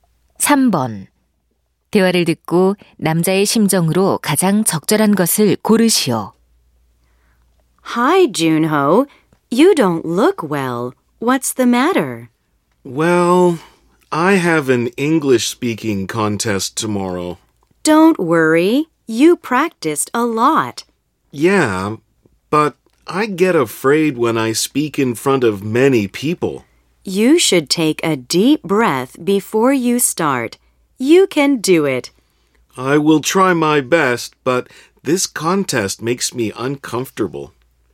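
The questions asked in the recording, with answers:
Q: 대화를 듣고 남자의 심정으로 가장 적절한 것을 고르시오.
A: 긴장되고 불안함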